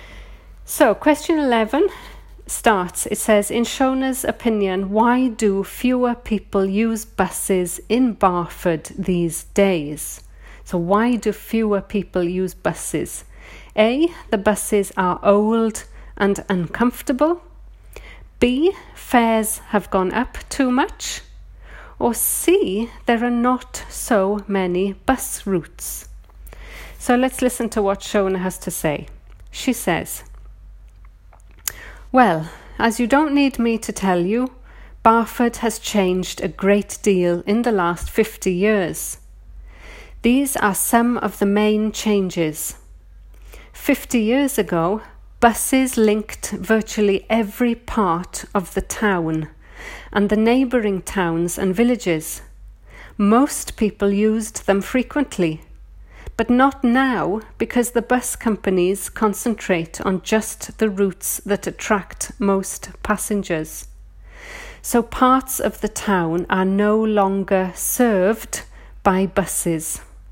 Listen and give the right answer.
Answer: This gives us answer C. There are not so many bus routes.